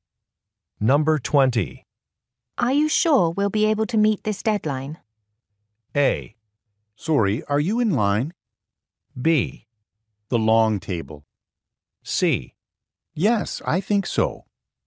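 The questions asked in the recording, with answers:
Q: Are you sure we'll be able to meet this deadline?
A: C: Yes, I think so.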